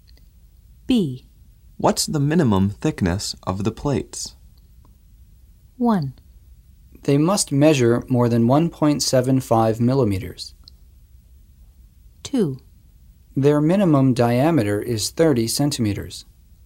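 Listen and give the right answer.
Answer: 1: They must measure more than 1.75 millimeters.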